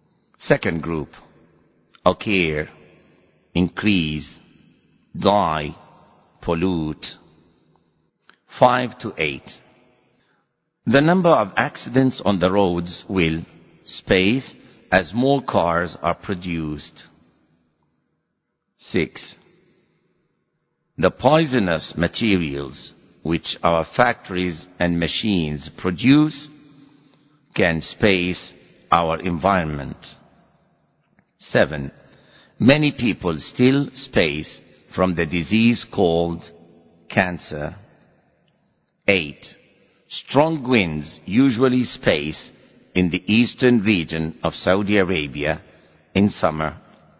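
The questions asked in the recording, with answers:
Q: The number of accidents on the roads will space as more cars are produced.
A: increase

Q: 6. The poisonous materials which our factories and machines produce can space our environment.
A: pollute

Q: 7. Many people still space from the disease called cancer.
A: die

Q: 8. Strong winds usually space in the eastern region of Saudi Arabia in summer.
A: occur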